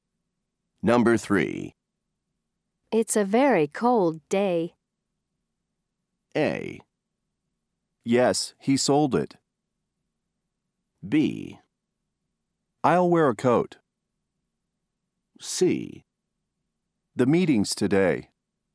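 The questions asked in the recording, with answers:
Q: It's a very cold day.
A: B: I'll wear a coat.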